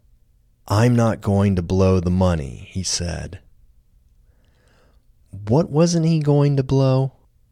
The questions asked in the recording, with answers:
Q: What wasn't he going to blow?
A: He wasn't going to blow the money.